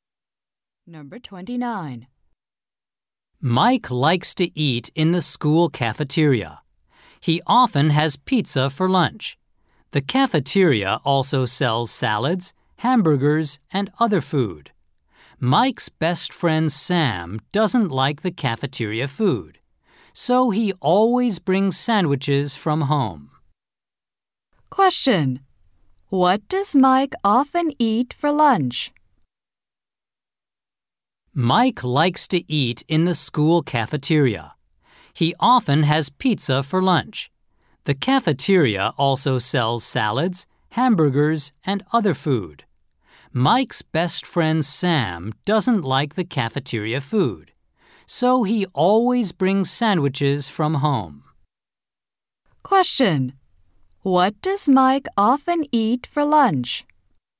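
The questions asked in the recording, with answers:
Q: What does Mike often eat for lunch?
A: Pizza.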